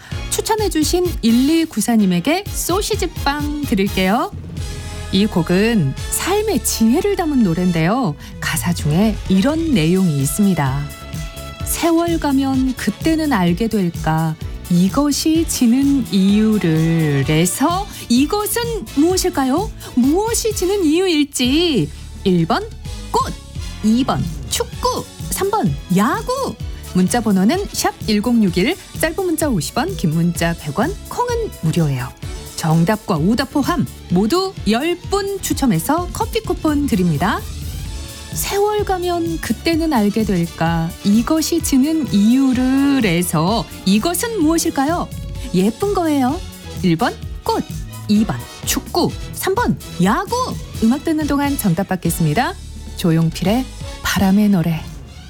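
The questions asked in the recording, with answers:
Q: 이것이 지는 이유를 해서 이것은 무엇일까요?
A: 1: 꽃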